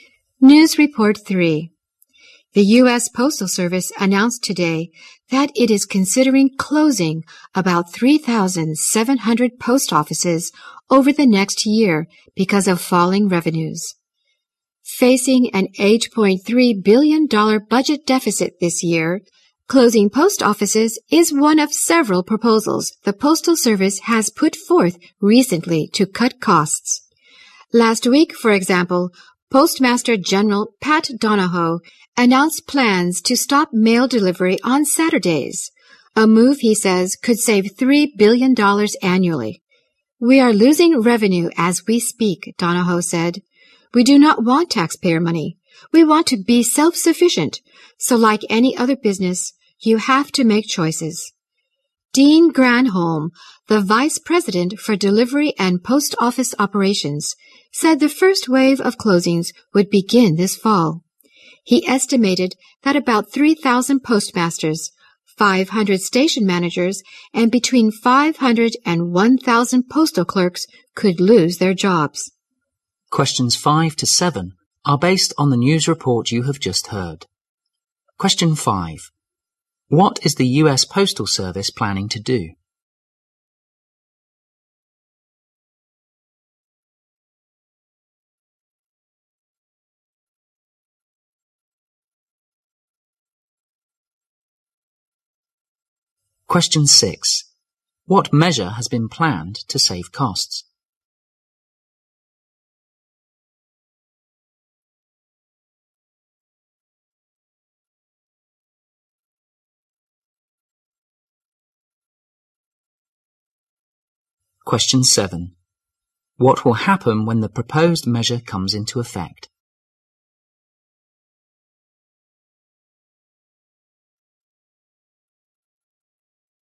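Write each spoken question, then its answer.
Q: What is the U.S. Postal Service planning to do?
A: Close about 3,700 post offices

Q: What measure has been planned to save costs?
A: Stop mail delivery on Saturdays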